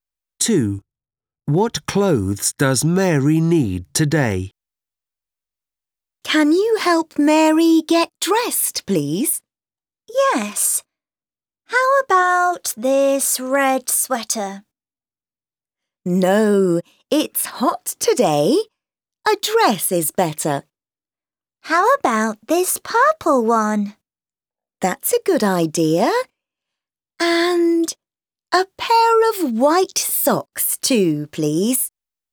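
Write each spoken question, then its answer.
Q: What clothes does Mary need today?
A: A purple dress and a pair of white socks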